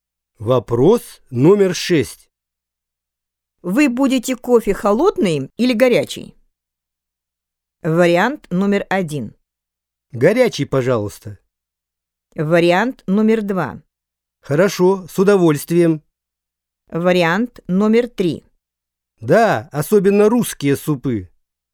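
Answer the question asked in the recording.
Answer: 1: Горячий, пожалуйста.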